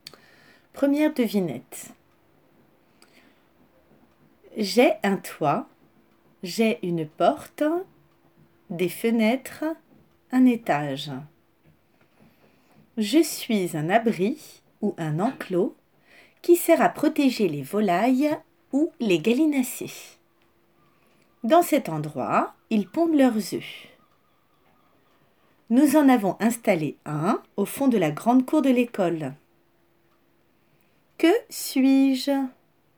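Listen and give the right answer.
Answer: un poulailler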